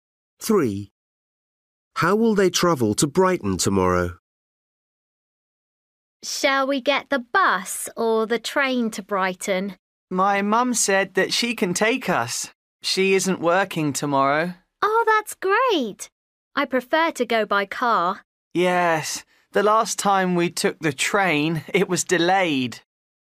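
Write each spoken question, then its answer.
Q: How will they travel to Brighton tomorrow?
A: By car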